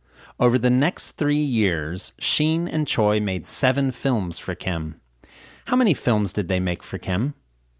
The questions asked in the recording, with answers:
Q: How many films did they make for Kim?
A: They made 7 films for Kim.